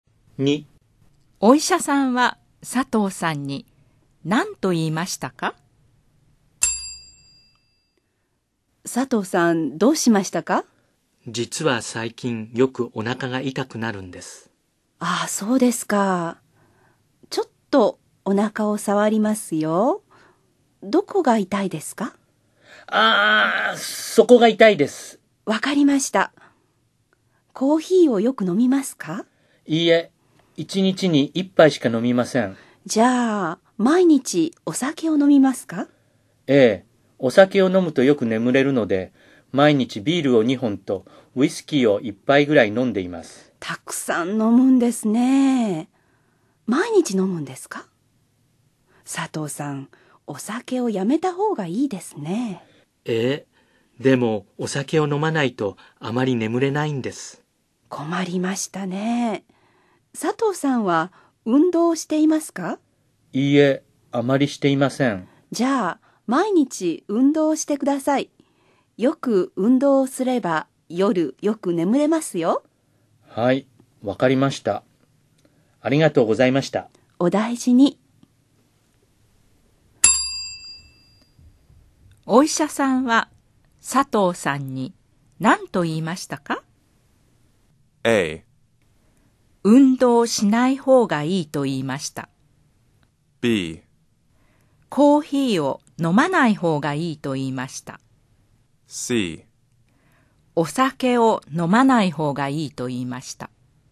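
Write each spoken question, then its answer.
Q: お医者さんは佐藤さんに何と言いましたか?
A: C: お酒を飲まない方がいいと言いました。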